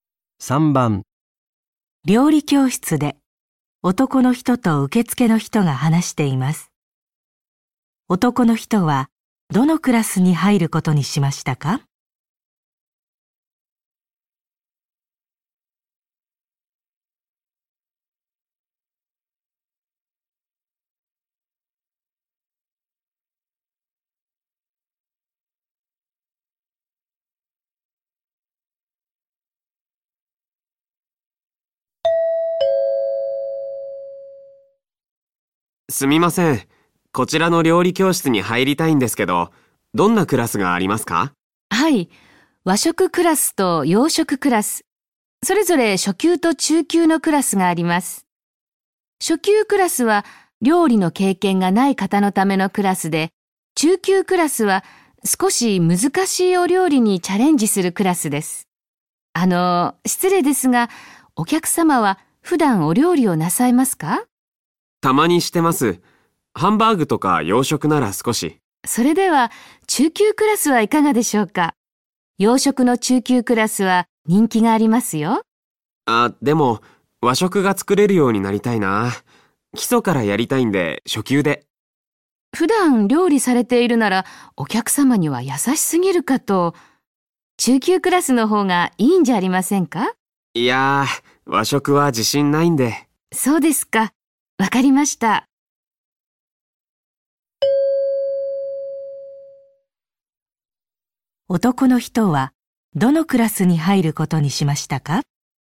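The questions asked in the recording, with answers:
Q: 男の人はどのクラスに入ることにしましたか?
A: 和食の初級クラス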